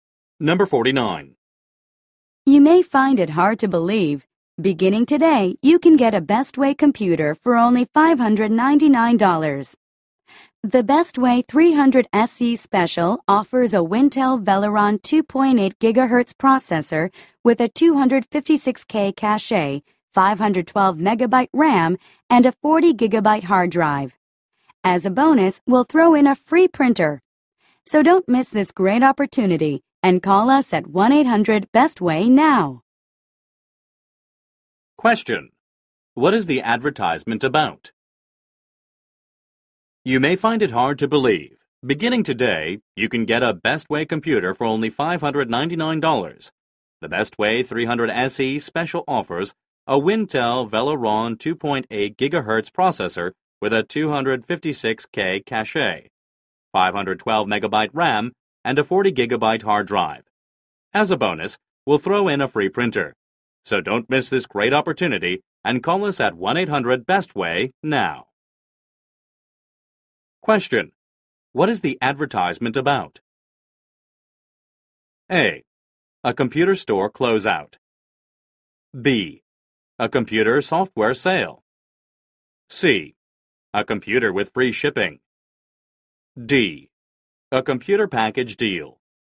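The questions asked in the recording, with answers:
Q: What is the advertisement about?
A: D: A computer package deal.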